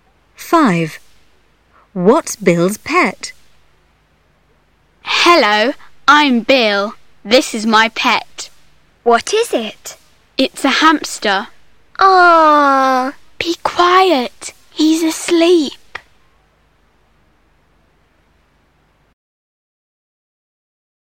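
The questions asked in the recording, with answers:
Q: What's Bill's pet?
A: A hamster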